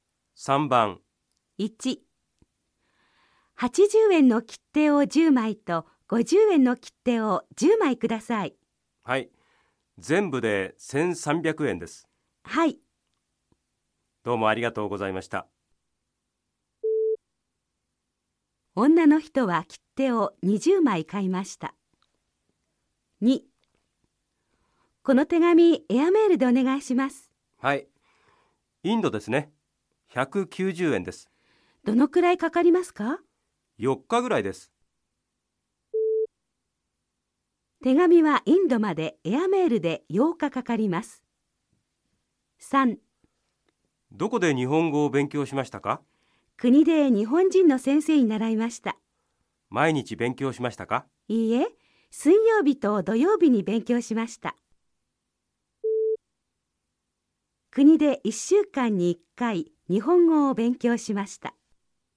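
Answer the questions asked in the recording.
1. ○(正しい)
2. ×(4日ぐらいかかります)
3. ×(水曜日と土曜日、1週間に2回)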